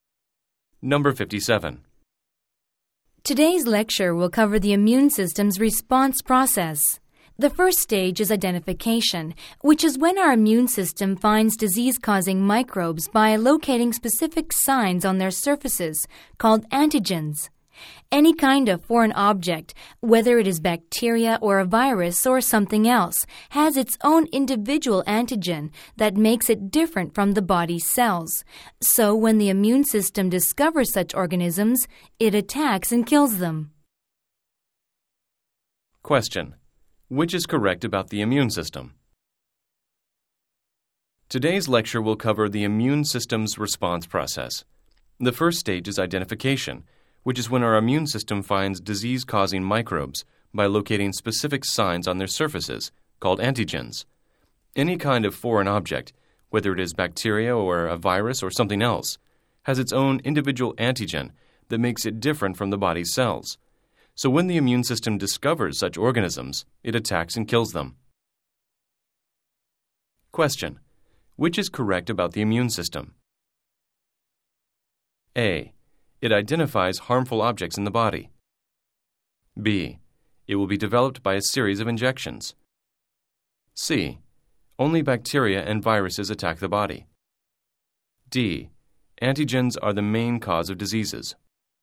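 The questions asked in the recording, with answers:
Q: Which is correct about the immune system?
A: A: It identifies harmful objects in the body.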